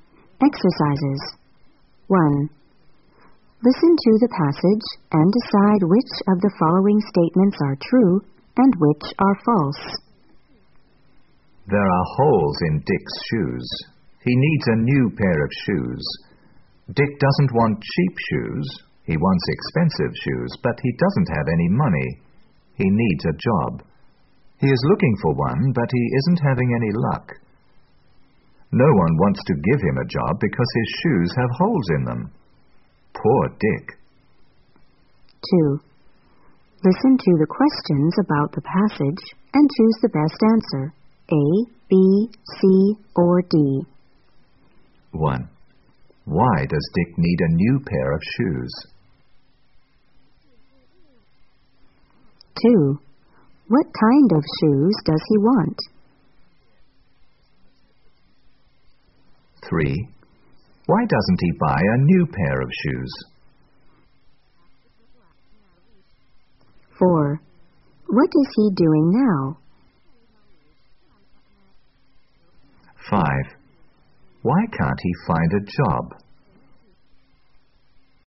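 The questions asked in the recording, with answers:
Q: Why does Dick need a new pair of shoes?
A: Because there are holes in his shoes.

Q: What kind of shoes does he want?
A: Expensive shoes.

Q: Why doesn't he buy a new pair of shoes?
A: He doesn't have any money.

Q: What is he doing now?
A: Looking for a job.

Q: Why can't he find a job?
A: Because his shoes have holes in them.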